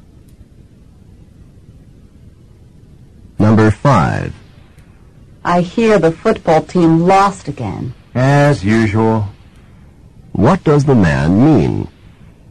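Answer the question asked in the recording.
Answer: The team often loses.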